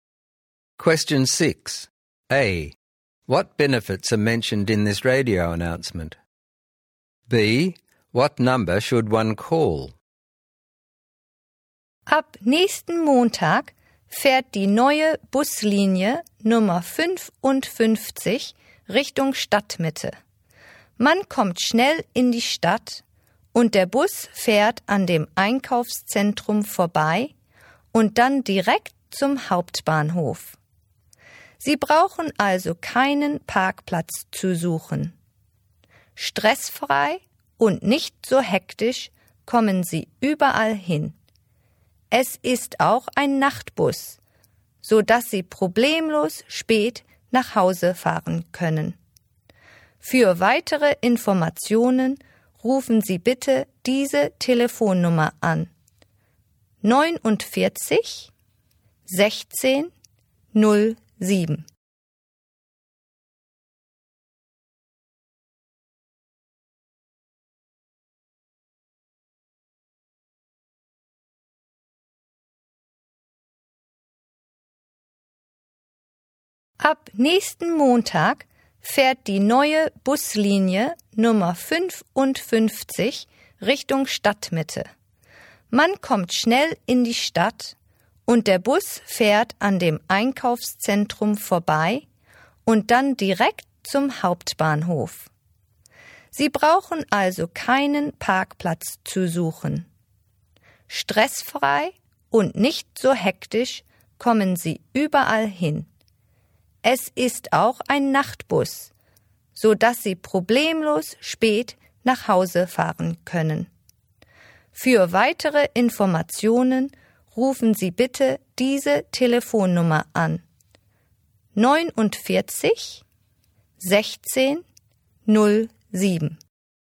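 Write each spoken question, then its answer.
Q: A. What benefits are mentioned in this radio announcement?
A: Fast trip into the city, passes the shopping centre and goes straight to the main station, no need to find parking, stress-free, and it also runs as a night bus

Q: B. What number should one call?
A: 49 16 0 7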